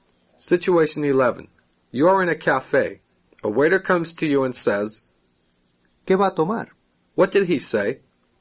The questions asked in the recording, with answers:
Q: What did he say?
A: What are you going to have?